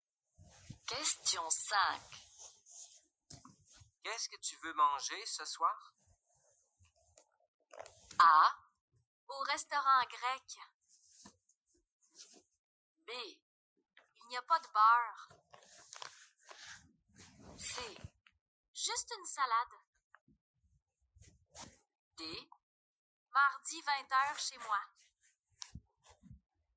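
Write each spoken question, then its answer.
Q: Qu'est-ce que tu veux manger ce soir?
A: C: Juste une salade.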